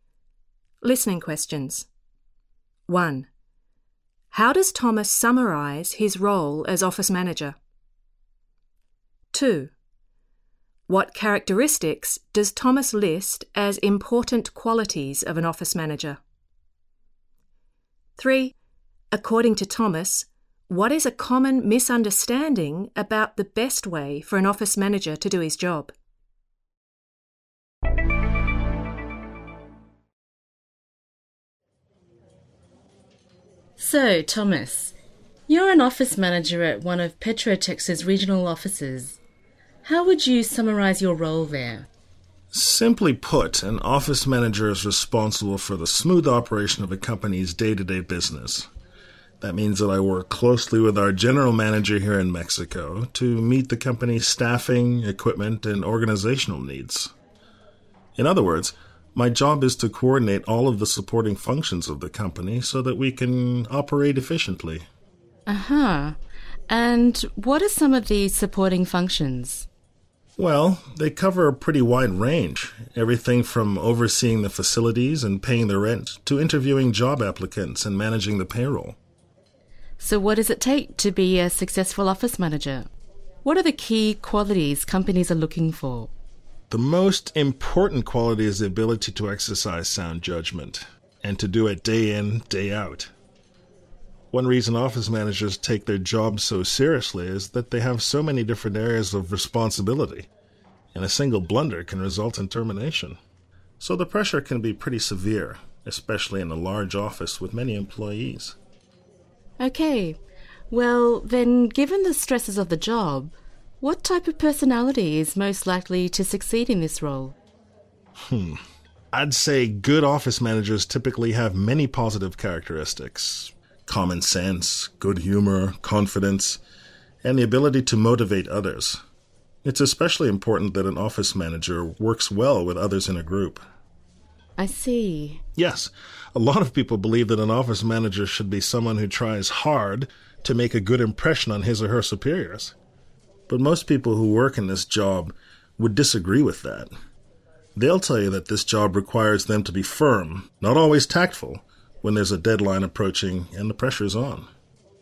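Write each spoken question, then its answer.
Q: How does Thomas summarize his role as office manager?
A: He is responsible for the smooth operation of the company's day-to-day business, coordinating all the supporting functions so the company can operate efficiently.

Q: What characteristics does Thomas list as important qualities of an office manager?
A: Sound judgment, common sense, good humor, confidence, the ability to motivate others and to work well with others in a group.

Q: According to Thomas, what is a common misunderstanding about the best way for an office manager to do his job?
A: That an office manager should try hard to make a good impression on superiors; in fact the manager must be firm, and not always tactful, under deadline pressure.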